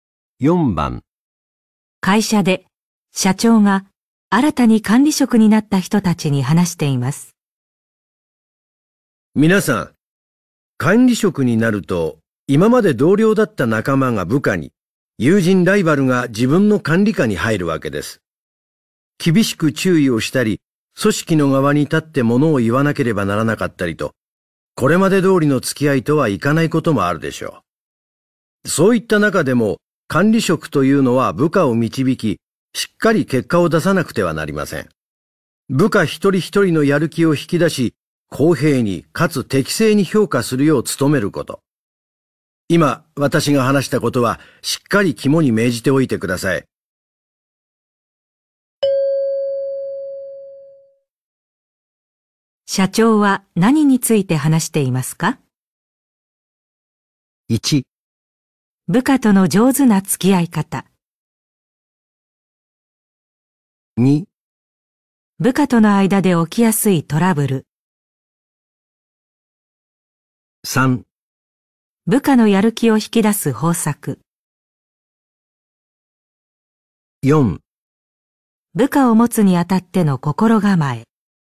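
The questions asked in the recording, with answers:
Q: 社長は何について話していますか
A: 4: 部下を持つにあたっての心構え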